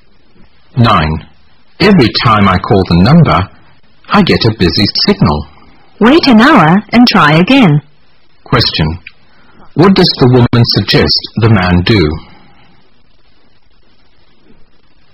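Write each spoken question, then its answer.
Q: What does the woman suggest the man do?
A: Wait an hour and call again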